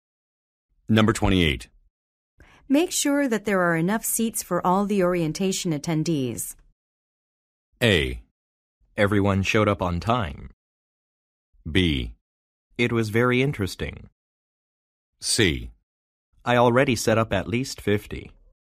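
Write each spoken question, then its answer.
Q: Make sure that there are enough seats for all the orientation attendees.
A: C: I already set up at least 50.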